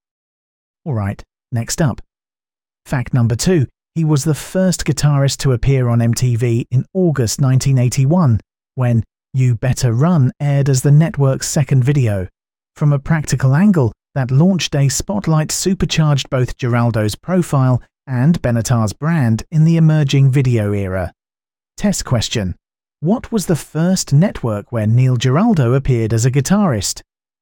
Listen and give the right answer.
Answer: Correct answer, MTV.